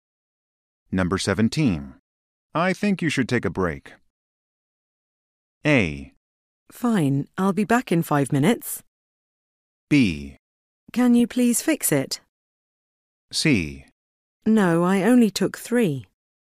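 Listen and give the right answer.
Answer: A: Fine, I'll be back in 5 minutes.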